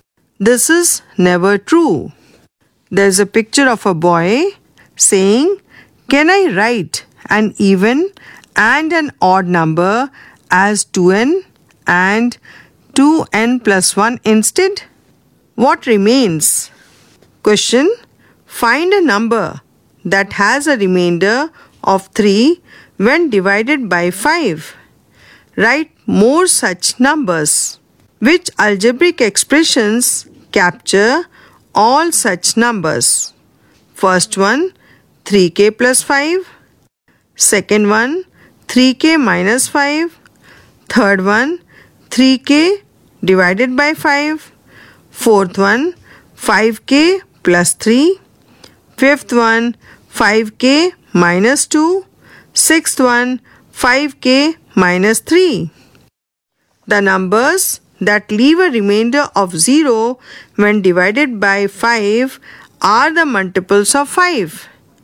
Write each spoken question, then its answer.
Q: Which algebraic expressions capture all such numbers?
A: So, numbers that leave a remainder of 3 when divided by 5 are those of the form 5k plus 3.